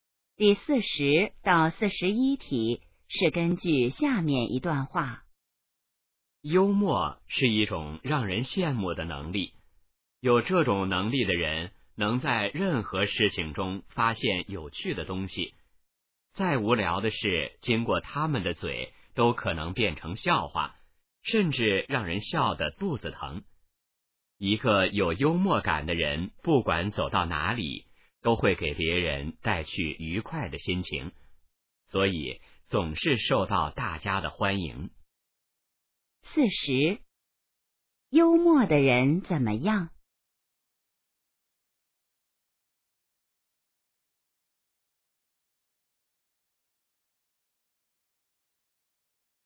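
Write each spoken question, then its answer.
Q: 幽默的人怎么样?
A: 能在任何事情中发现有趣的东西

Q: 幽默的人为什么受欢迎?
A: 给别人带去愉快的心情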